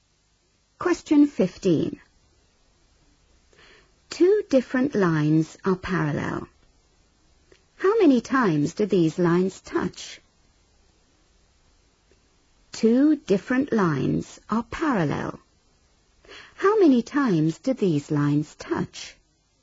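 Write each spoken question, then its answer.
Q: How many times do these lines touch?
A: 0 (never)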